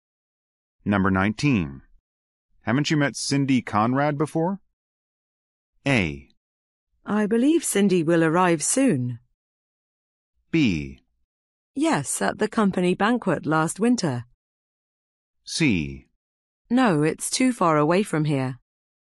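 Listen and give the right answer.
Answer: B: Yes, at the company banquet last winter.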